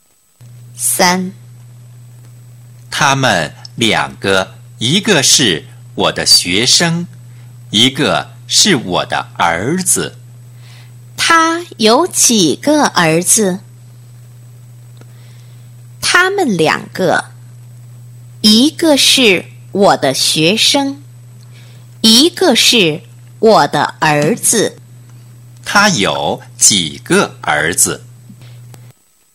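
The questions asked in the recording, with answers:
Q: 他有几个儿子?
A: 一个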